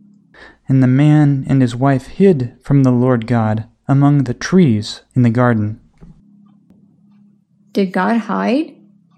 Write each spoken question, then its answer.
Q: Did God hide?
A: No, God did not hide.